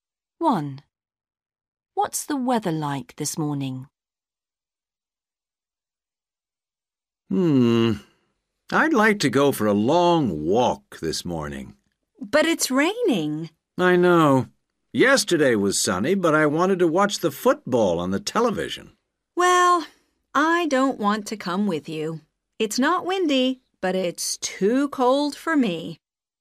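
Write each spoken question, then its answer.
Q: What's the weather like this morning?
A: It's raining.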